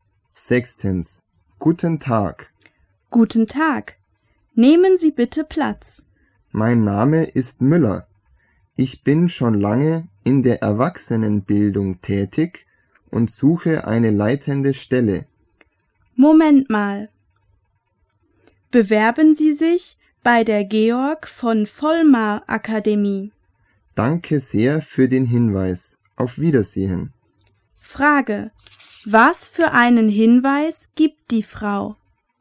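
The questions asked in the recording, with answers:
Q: Was für einen Hinweis gibt die Frau?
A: Er soll sich bei der Georg von Vollmar Akademie bewerben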